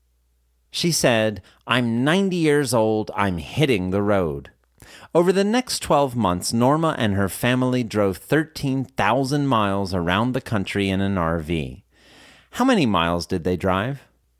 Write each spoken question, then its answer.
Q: How many miles did they drive?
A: They drove 13,000 miles.